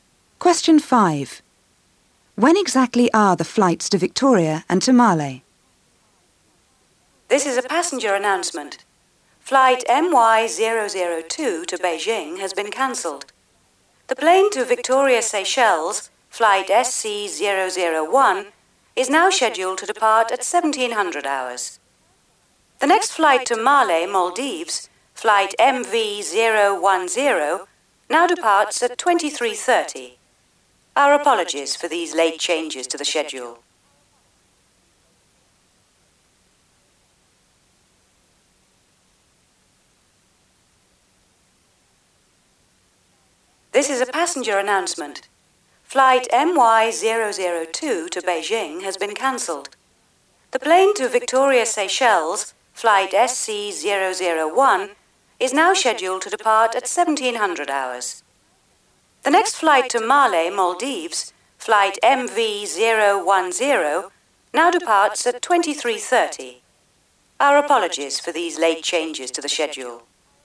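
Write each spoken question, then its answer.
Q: When exactly are the flights to Victoria and to Male?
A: Victoria at 1700 hours; Male at 2330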